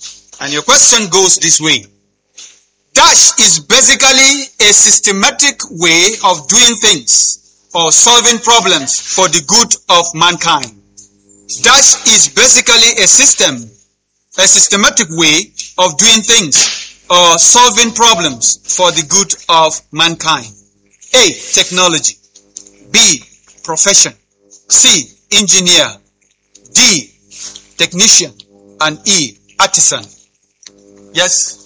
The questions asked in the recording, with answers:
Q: Dash is basically a systematic way of doing things or solving problems for the good of mankind.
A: Technology!